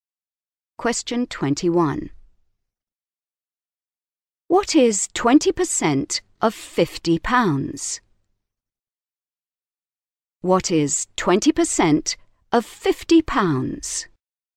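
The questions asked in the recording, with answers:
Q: What is 20% of 50 pounds?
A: 10 pounds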